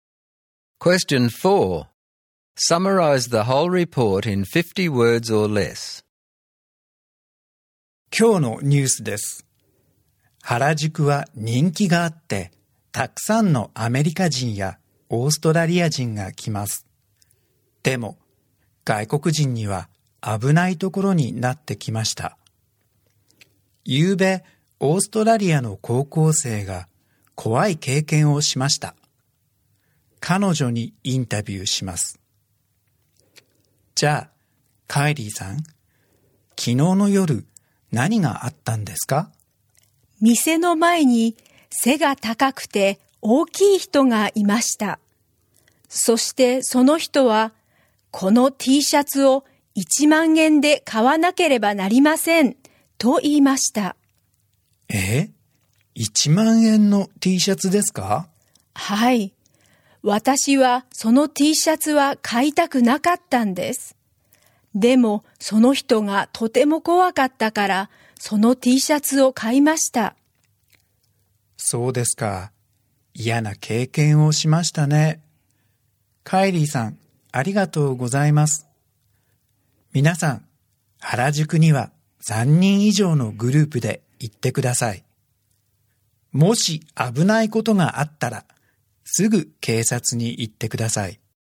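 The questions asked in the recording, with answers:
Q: Summarize the whole report in 50 words or less.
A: Harajuku is becoming dangerous for foreigners. An Australian student was scared by a big man into buying a 10,000-yen T-shirt. Visitors should go in groups of three or more and go to the police right away if there is trouble.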